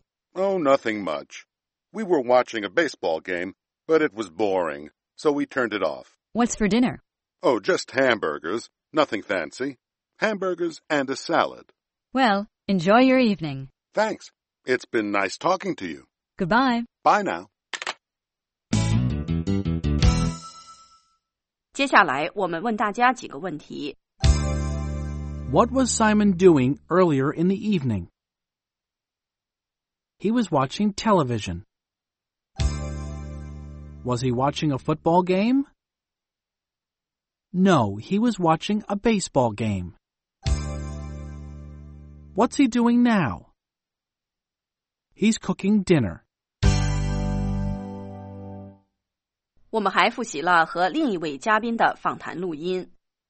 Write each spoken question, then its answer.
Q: What was Simon doing earlier in the evening?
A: He was watching television.